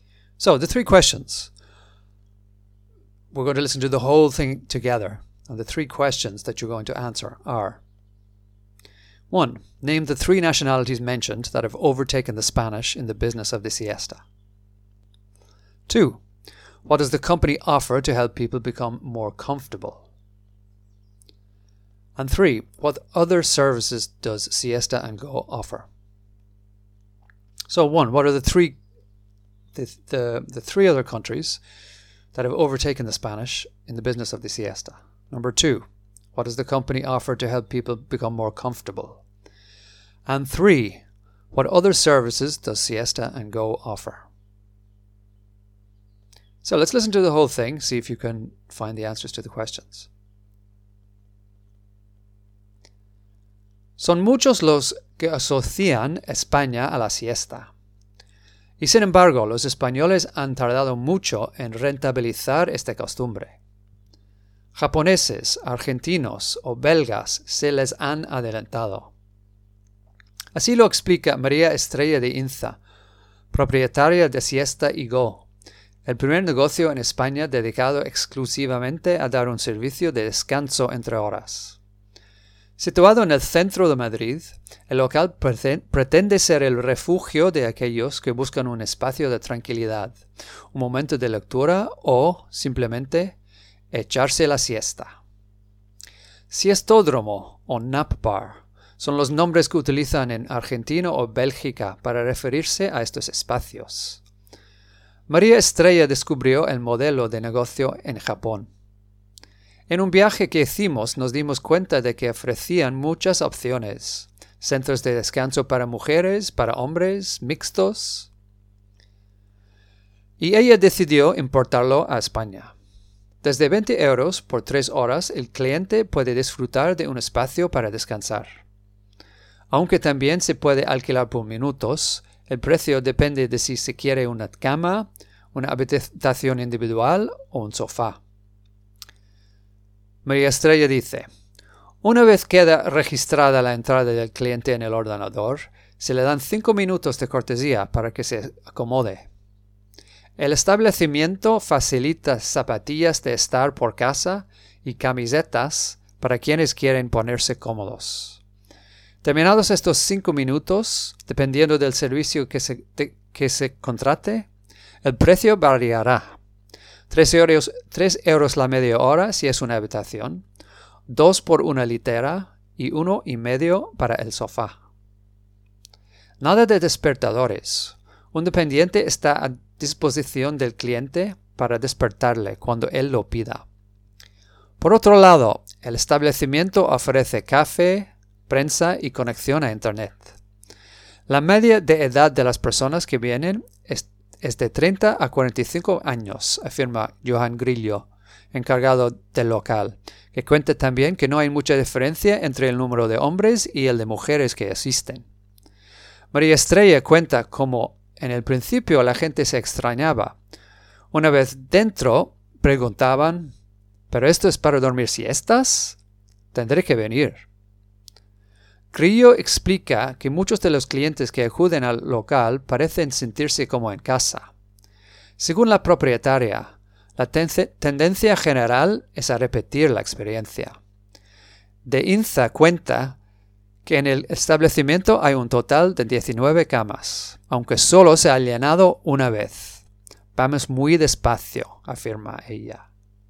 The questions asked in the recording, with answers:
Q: name the three nationalities mentioned that have overtaken the Spanish in the business of the siesta.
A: Japoneses, Argentinos, or Belgas.

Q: what does the company offer to help people become more comfortable?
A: Se le dan cinco minutos de cortesía para que se acomode.

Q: what other services does Siesta and Go offer?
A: un dependiente está a disposición del cliente para despertarle cuando él lo pida.